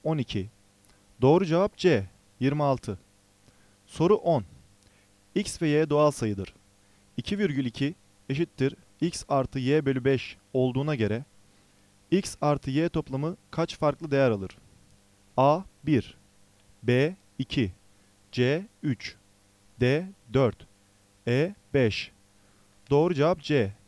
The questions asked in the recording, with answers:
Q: 2,2 eşittir X artı Y bölü 5 olduğuna göre X artı Y toplamı kaç farklı değer alır?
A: Doğru cevap C.